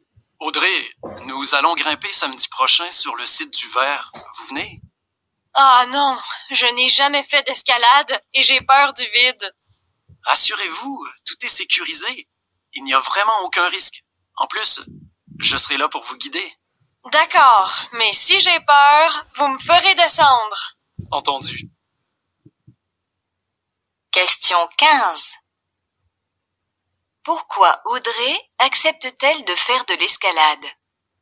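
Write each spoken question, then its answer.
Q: Pourquoi Audrey accepte-t-elle de faire de l'escalade?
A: Parce que tout est sécurisé, sans risque, et qu'on la guidera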